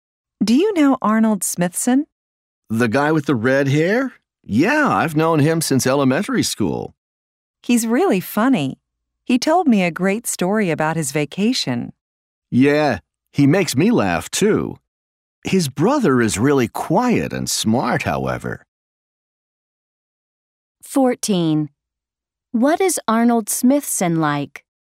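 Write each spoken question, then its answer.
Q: What is Arnold Smithson like?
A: He is funny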